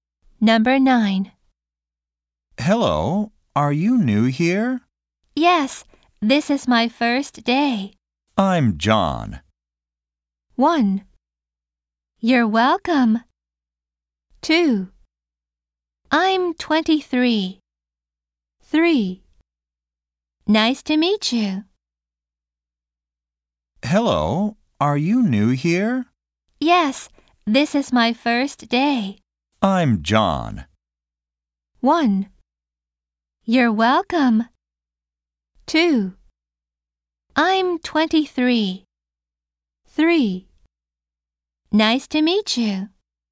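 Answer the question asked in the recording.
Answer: 3: Nice to meet you.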